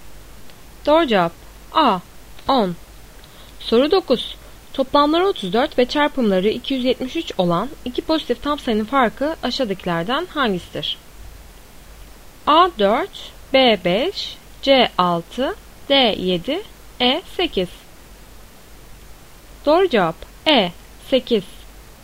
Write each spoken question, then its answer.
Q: Toplamları 34 ve çarpımları 273 olan iki pozitif tam sayının farkı aşağıdakilerden hangisidir?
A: Doğru cevap E 8.